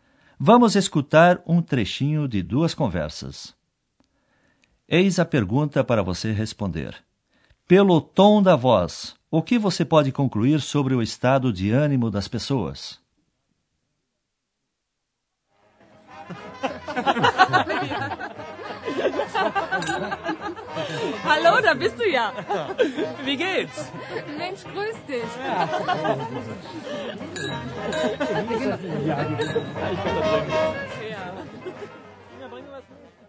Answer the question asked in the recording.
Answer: Elas estão alegres, não é?